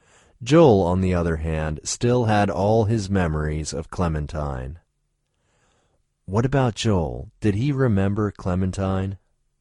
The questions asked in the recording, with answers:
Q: What about Joel? Did he remember Clementine?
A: Yes, Joel still had all his memories of Clementine.